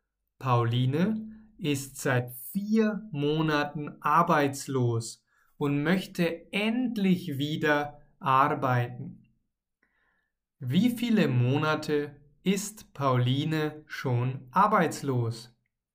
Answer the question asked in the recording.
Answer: Vier. Sie ist schon seit 4 Monaten arbeitslos.